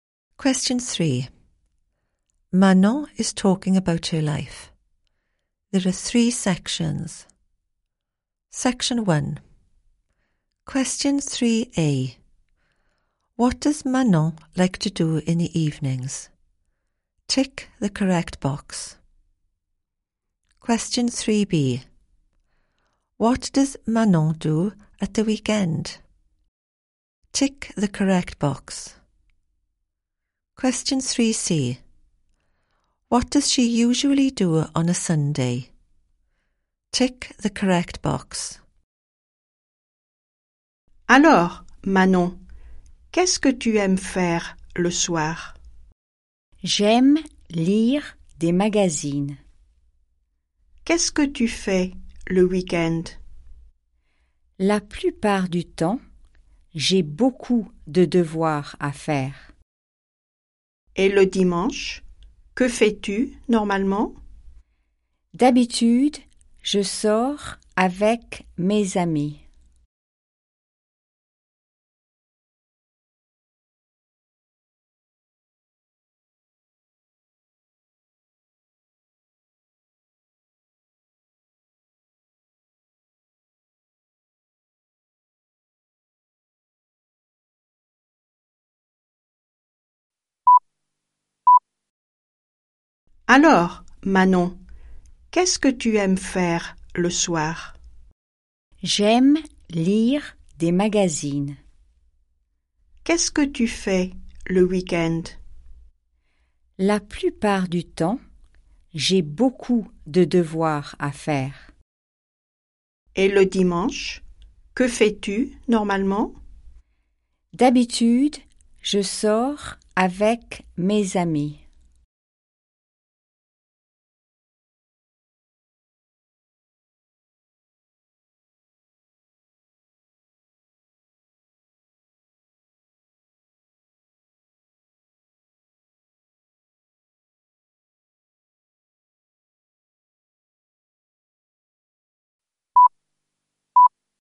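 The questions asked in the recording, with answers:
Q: What does Manon like to do in the evenings?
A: Read magazines

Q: What does Manon do at the weekend?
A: Lots of homework

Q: What does she usually do on a Sunday?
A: Goes out with her friends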